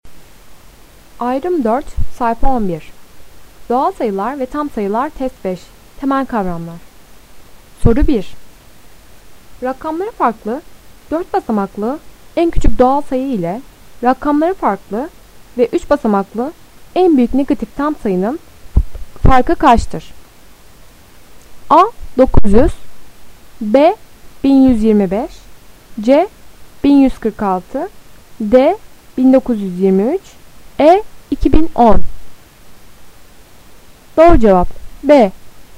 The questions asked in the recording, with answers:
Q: Rakamları farklı, 4 basamaklı, en küçük doğal sayı ile rakamları farklı ve 3 basamaklı, en büyük negatif tam sayının farkı kaçtır?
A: Doğru cevap B.